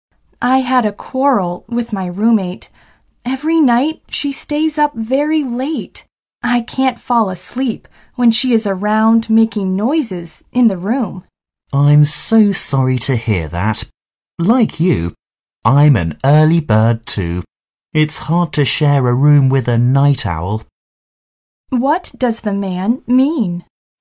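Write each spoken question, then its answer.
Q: What does the man mean?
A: He understands her; as an early bird, he also finds it hard to share a room with a night owl.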